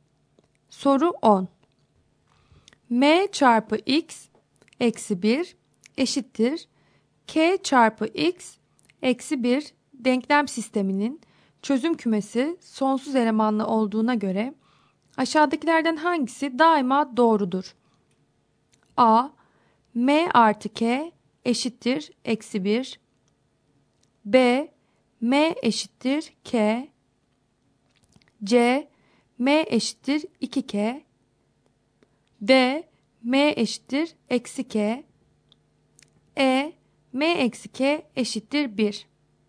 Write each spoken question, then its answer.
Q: K çarpı X eksi 1 denklem sisteminin çözüm kümesi sonsuz elemanlı olduğuna göre aşağıdakilerden hangisi daima doğrudur?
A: Doğru cevap B şıkkı.